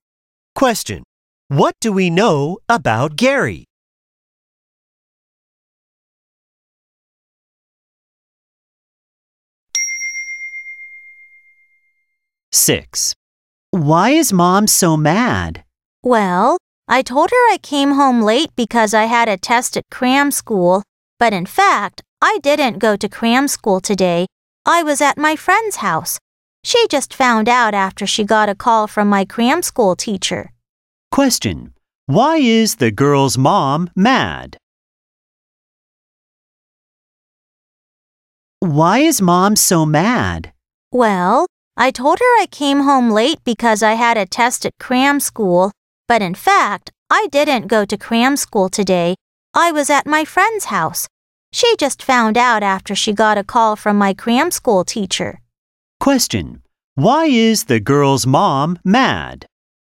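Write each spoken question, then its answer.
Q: Why is the girl's mom mad?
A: The girl lied about being at cram school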